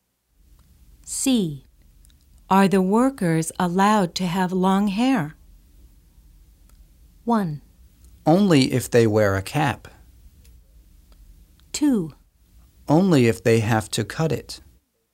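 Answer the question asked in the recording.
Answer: 1: Only if they wear a cap.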